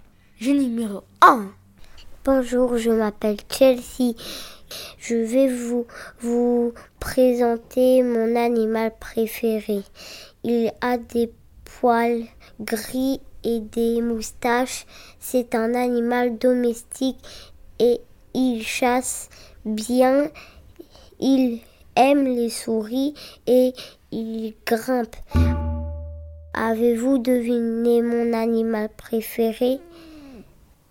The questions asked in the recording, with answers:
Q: Avez-vous deviné mon animal préféré?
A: Mon animal préféré était le chat.